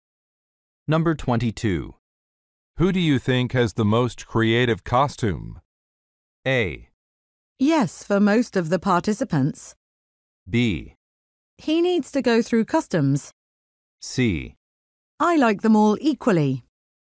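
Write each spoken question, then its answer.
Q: Who do you think has the most creative costume?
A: C: I like them all equally.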